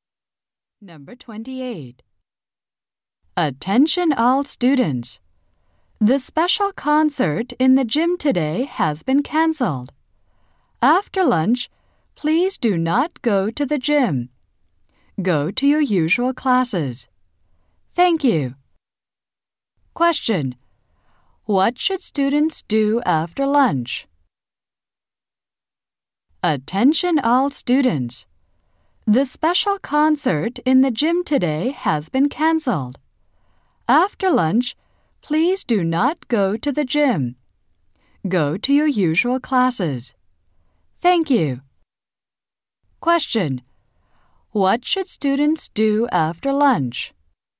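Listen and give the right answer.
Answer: Go to their usual classes.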